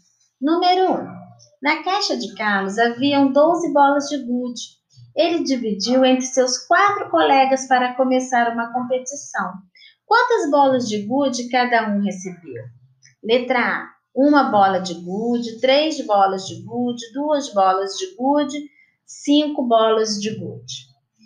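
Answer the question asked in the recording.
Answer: B: três bolas de gude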